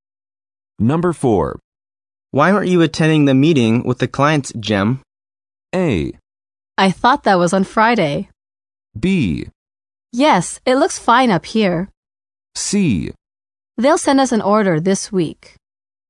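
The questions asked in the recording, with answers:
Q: Why aren't you attending the meeting with the clients, Jim?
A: A: I thought that was on Friday.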